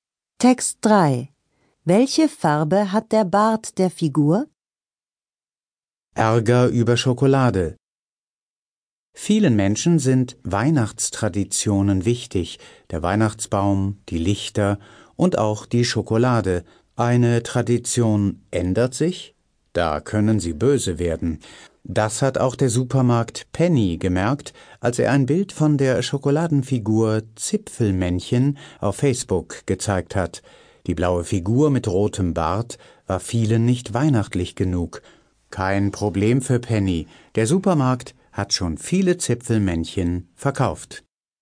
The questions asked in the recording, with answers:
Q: Welche Farbe hat der Bart der Figur?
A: Der Bart ist rot.